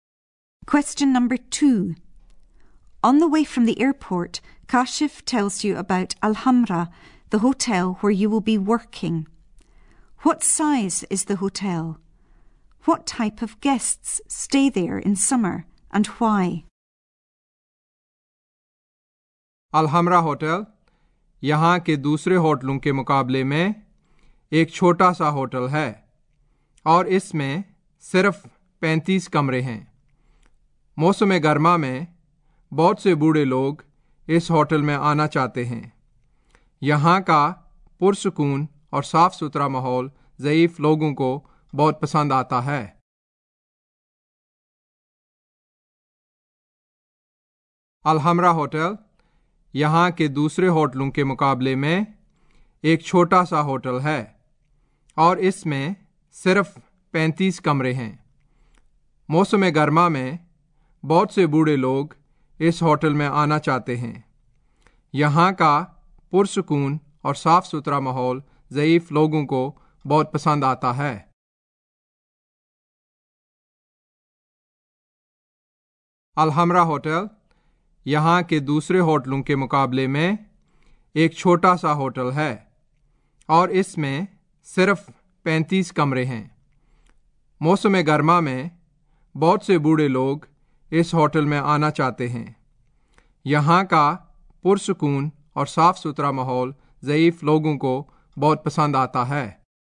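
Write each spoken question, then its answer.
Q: What size is the hotel? What type of guests stay there in summer and why?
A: Small, only 35 rooms; elderly people, because they like the peaceful, clean environment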